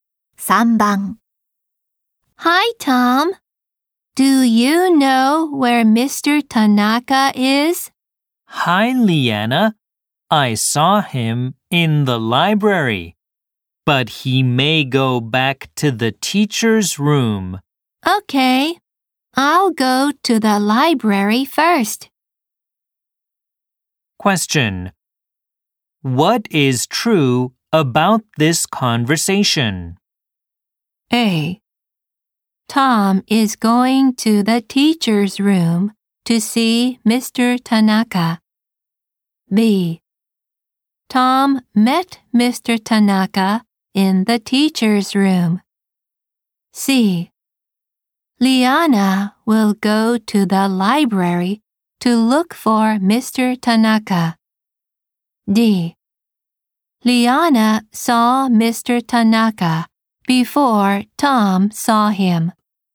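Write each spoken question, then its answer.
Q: What is true about this conversation?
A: C: Liana will go to the library to look for Mr. Tanaka.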